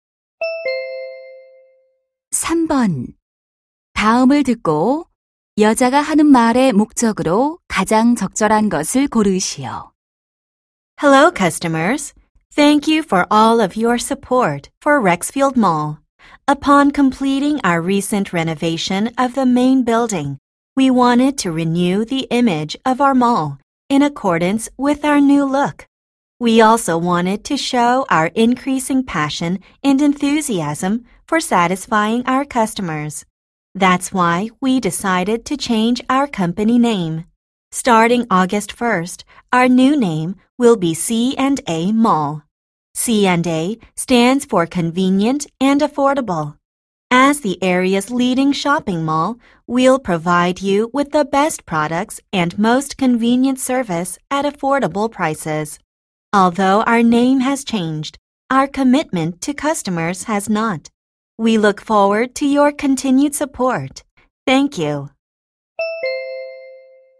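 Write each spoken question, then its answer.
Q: 다음을 듣고 여자가 하는 말의 목적으로 가장 적절한 것을 고르시오.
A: 쇼핑몰 회사명 변경을 알리려고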